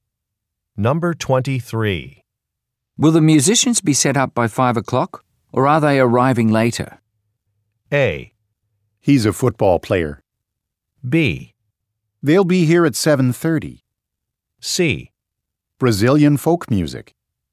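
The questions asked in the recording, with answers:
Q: Will the musicians be set up by 5 o'clock, or are they arriving later?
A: B: They'll be here at 7:30.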